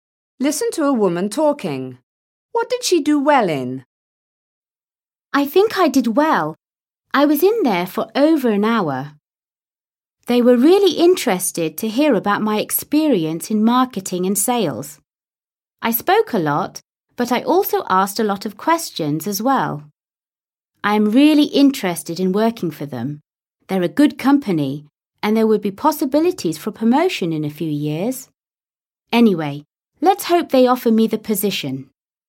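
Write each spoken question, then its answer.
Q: What did she do well in?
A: A job interview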